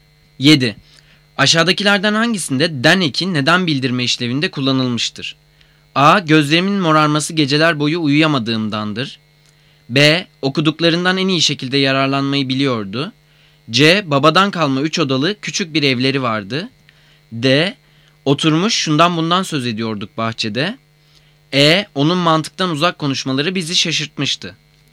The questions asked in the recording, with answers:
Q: Aşağıdakilerden hangisinde den eki neden bildirme işlevinde kullanılmıştır?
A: Cevap A. Gözlerimin morarması geceler boyu uyuyamadığımdandır.